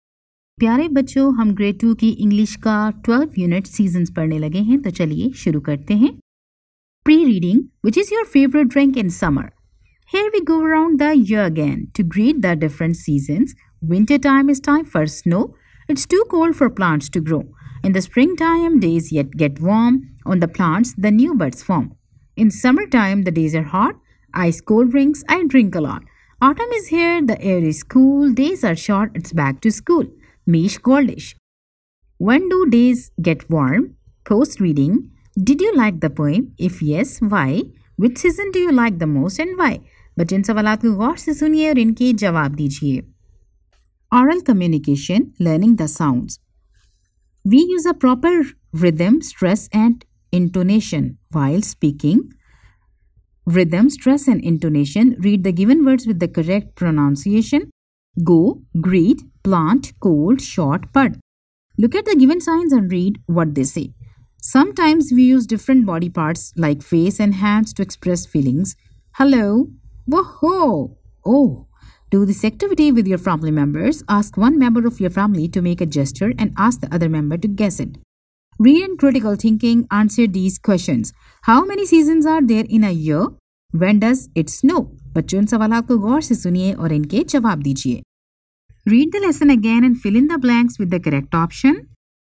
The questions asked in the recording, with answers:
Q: How many seasons are there in a year?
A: There are four seasons in a year.

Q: When does it snow?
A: Winter is a time for snow.